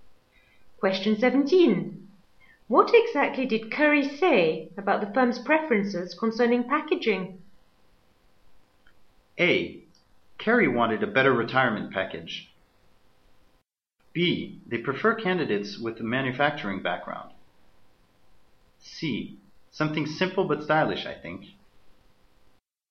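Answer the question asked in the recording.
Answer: C: Something simple but stylish, I think.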